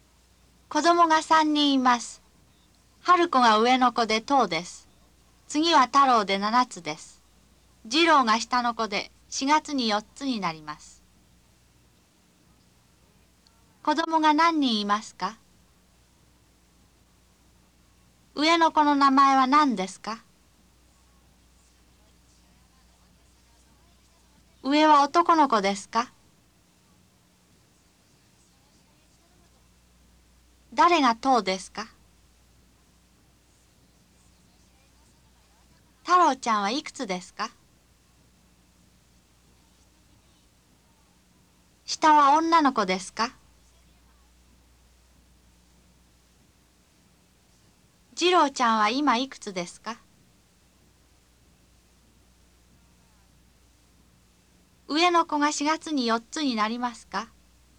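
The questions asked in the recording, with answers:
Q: 子供が何人いますか?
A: 3人

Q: 上の子の名前は何ですか?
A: 春子

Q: 太郎ちゃんはいくつですか?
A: 7つ

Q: 次郎ちゃんは今いくつですか?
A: 3つ

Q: 上の子が4月に4つになりますか?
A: いいえ、下の子(次郎)です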